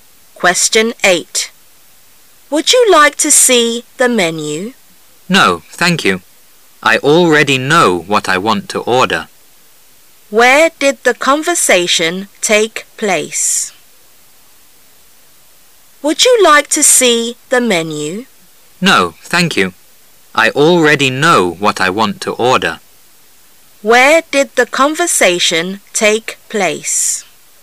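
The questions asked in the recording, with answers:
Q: Where did the conversation take place?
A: In a restaurant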